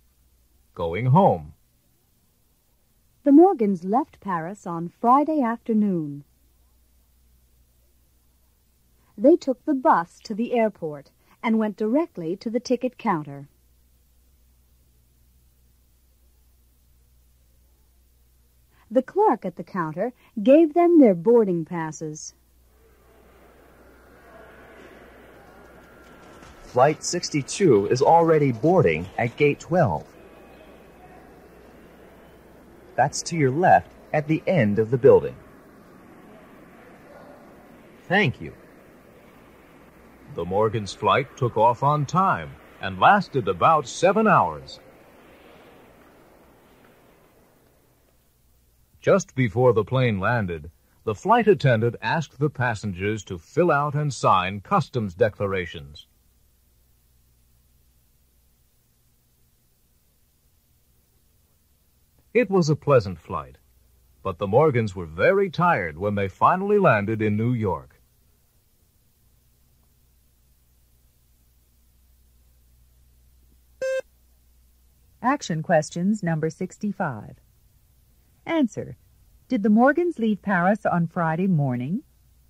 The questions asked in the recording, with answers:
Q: Did the Morgans leave Paris on Friday morning?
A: No, they didn't.